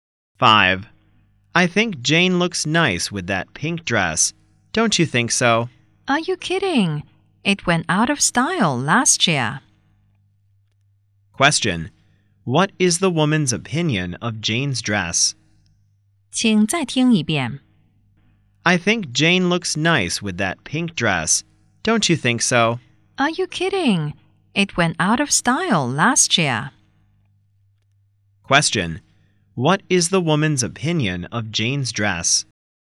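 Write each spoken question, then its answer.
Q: Question. What is the woman's opinion of Jane's dress?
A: It is out of style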